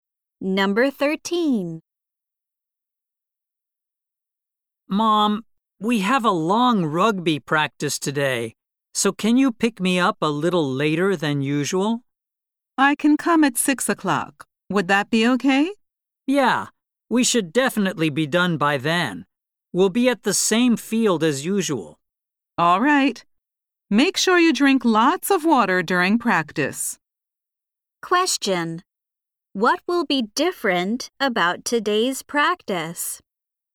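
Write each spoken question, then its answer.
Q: What will be different about today's practice?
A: It will be longer than usual.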